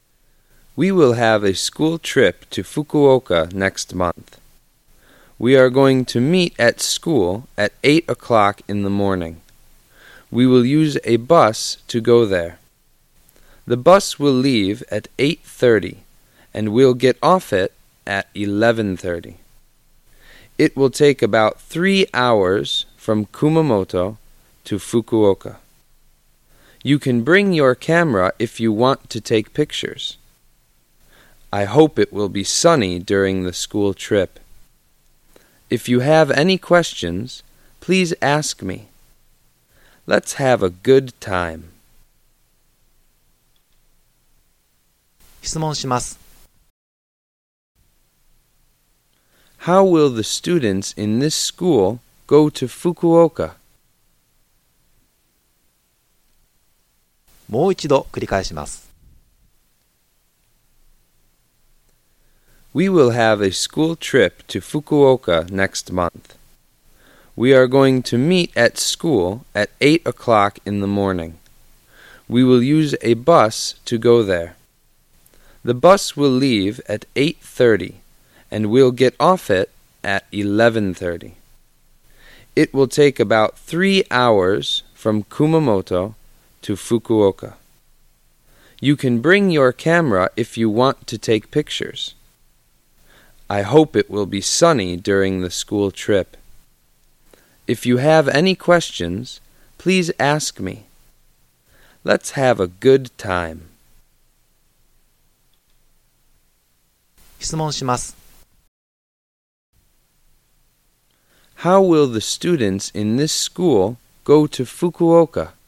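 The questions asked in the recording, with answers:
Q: How will the students in this school go to Fukuoka?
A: By bus.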